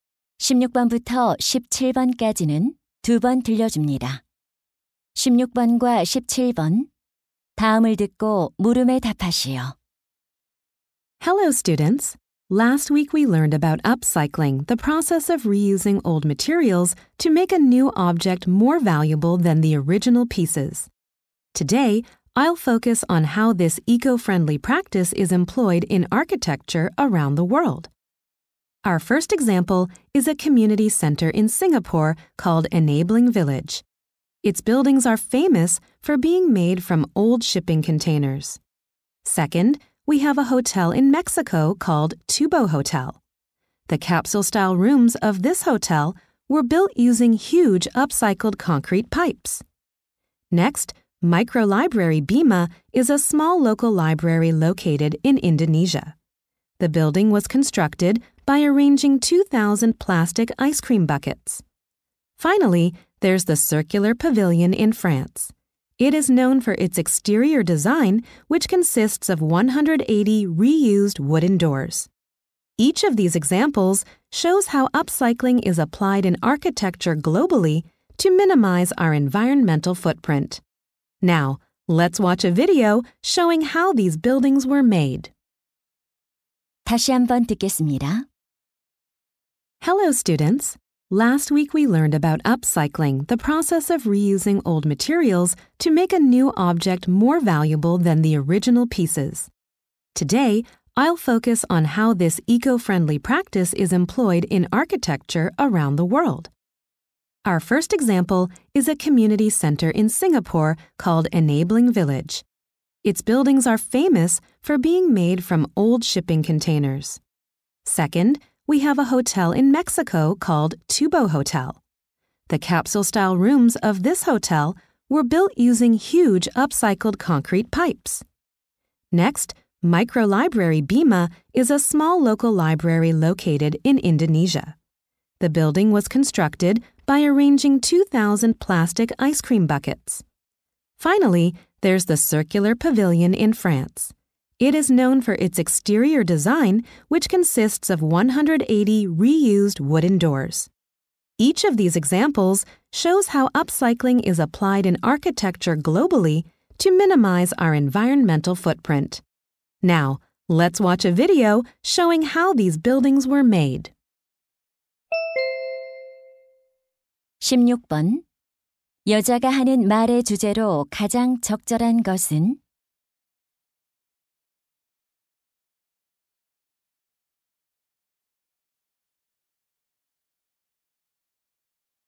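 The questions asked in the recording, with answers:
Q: 여자가 하는 말의 주제로 가장 적절한 것은?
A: 세계 여러 건축물에 적용된 업사이클링 사례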